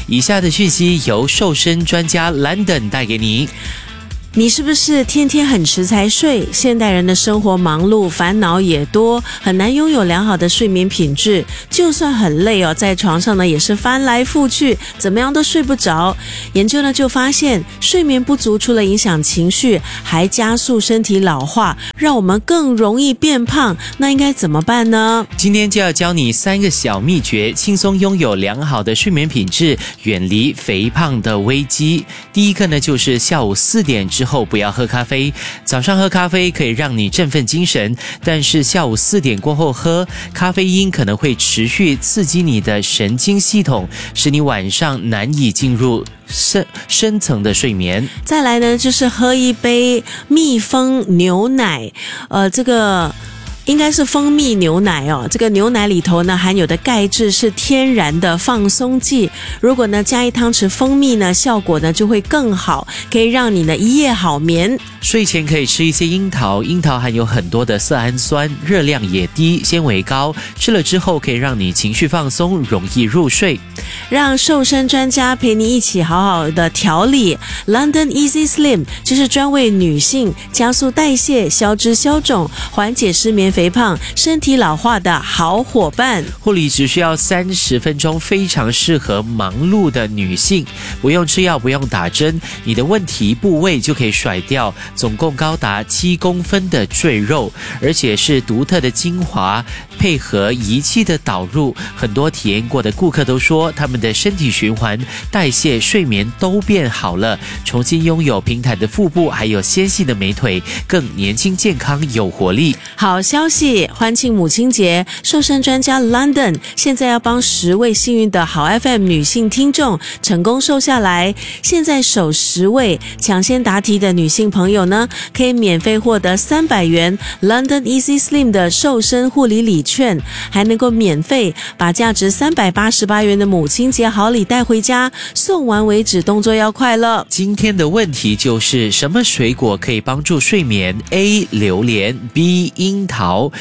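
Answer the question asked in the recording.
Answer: B: 樱桃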